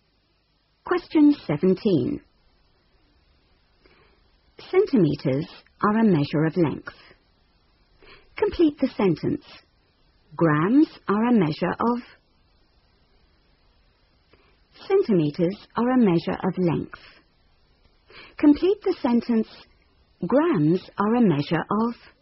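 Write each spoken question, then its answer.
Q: Complete the sentence. Grams are a measure of...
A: mass (weight)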